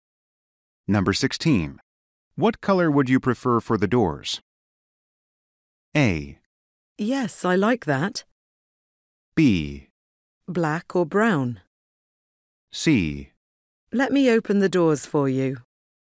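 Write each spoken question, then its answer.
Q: What color would you prefer for the doors?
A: B: Black or brown?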